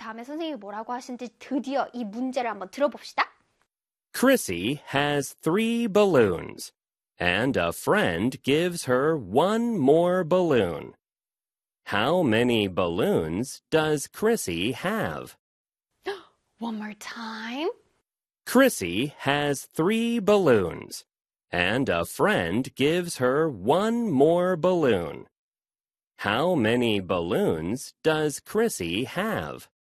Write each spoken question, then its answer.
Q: How many balloons does Chrissy have?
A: three plus one equals four.